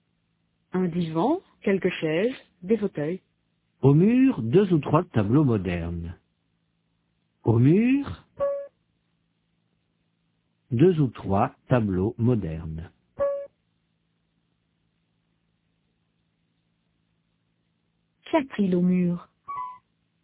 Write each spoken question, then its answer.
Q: Qu'y a-t-il au mur?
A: Deux ou trois tableaux modernes.